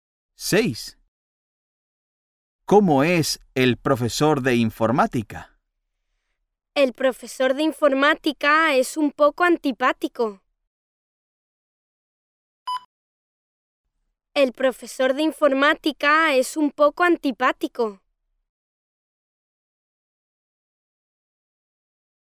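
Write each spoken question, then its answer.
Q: ¿Cómo es el profesor de informática?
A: un poco antipático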